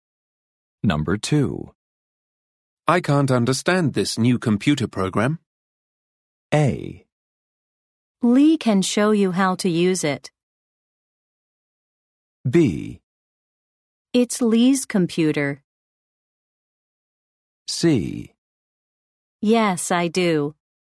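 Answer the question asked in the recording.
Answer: A: Lee can show you how to use it.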